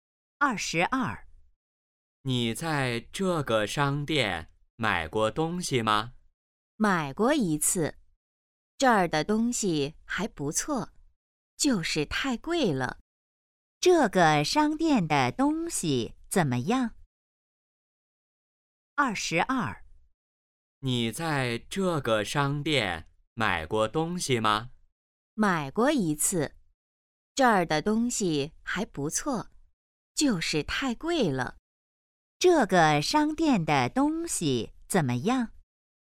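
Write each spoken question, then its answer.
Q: 这个商店的东西怎么样?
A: 不错,就是太贵了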